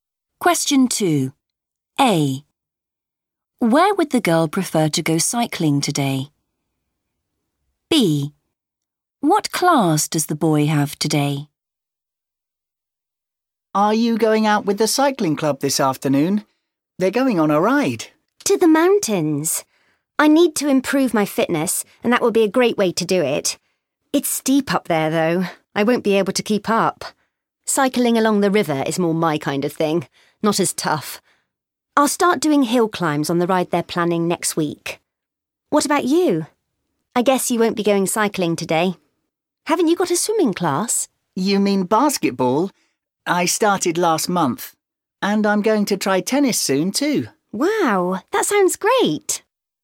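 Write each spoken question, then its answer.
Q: Where would the girl prefer to go cycling today?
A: along the river

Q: What class does the boy have today?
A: basketball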